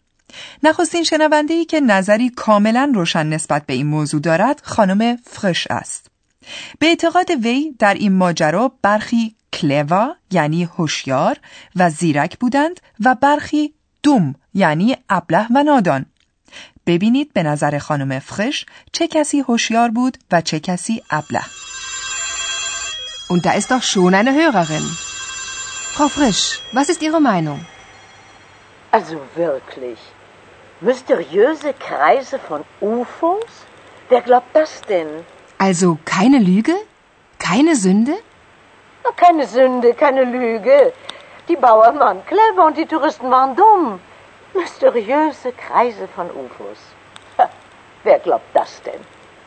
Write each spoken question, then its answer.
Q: ببینید به نظر خانم فرش چه کسی هوشیار بود و چه کسی ابله.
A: به نظر خانم فرش دهقانان یعنی باوان زیرک بودند و گردشگران ابله.